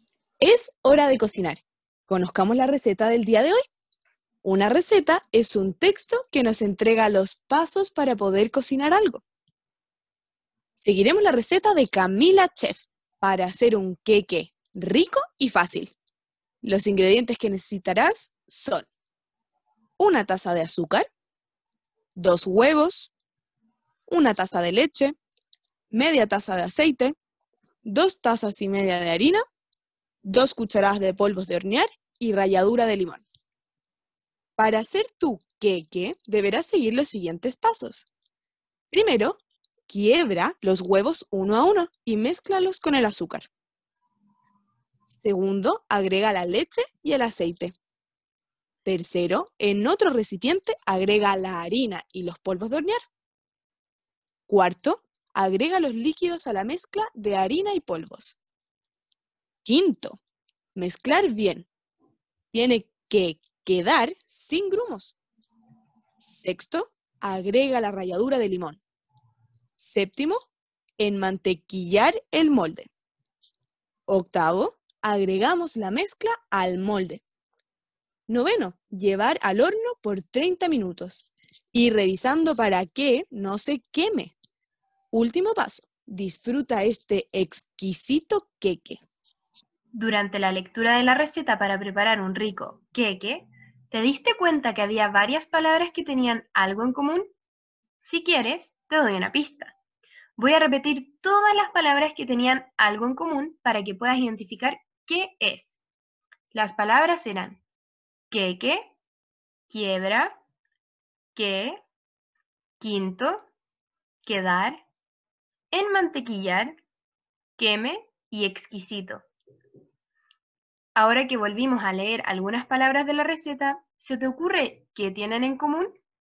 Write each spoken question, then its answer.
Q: Ahora que volvimos a leer algunas palabras de la receta, ¿se te ocurre qué tienen en común?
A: Todas estas palabras contienen las combinaciones que y qui.